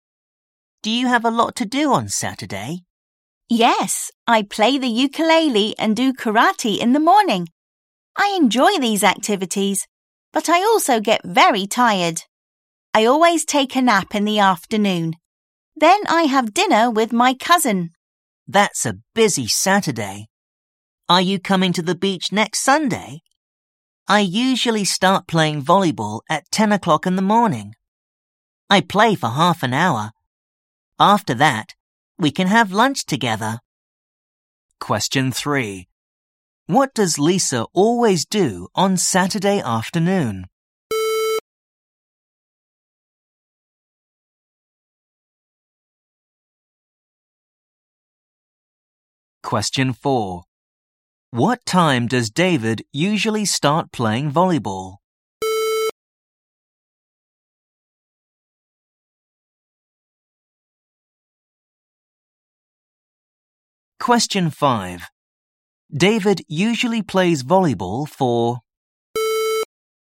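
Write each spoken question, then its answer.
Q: What does Lisa always do on Saturday afternoon?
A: Takes a nap

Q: What time does David usually start playing volleyball?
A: 10 o'clock in the morning

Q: David usually plays volleyball for...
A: Half an hour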